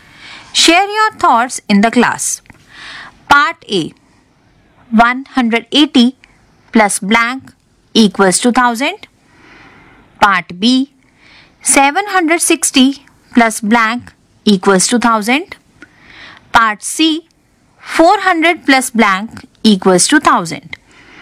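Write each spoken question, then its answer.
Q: Part A. 180 plus blank equals to 1000.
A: 820

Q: Part B. 760 plus blank equals to 1000.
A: 240

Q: Part C. 400 plus blank equals to 1000.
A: 600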